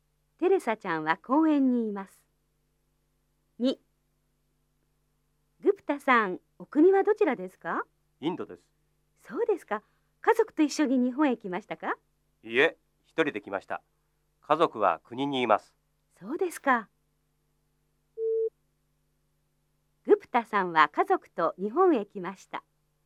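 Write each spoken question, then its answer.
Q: グプタさんは家族と日本へ来ました。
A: 正しくない(×):一人で来ました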